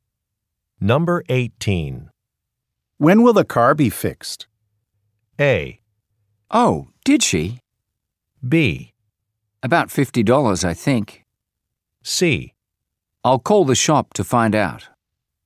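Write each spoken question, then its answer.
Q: When will the car be fixed?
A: C: I'll call the shop to find out.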